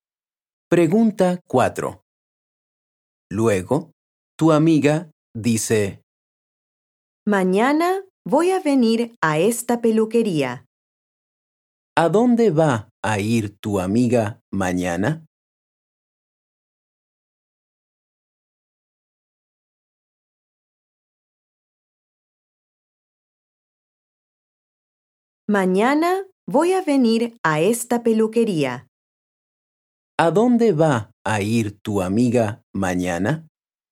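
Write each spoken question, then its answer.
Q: ¿A dónde va a ir tu amiga mañana?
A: a la peluquería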